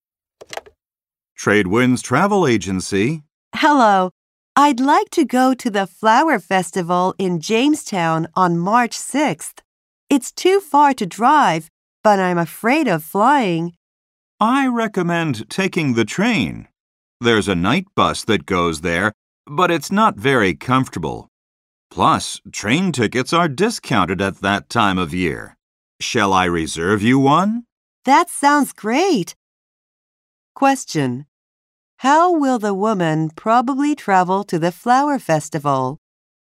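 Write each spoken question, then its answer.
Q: How will the woman probably travel to the flower festival?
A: By train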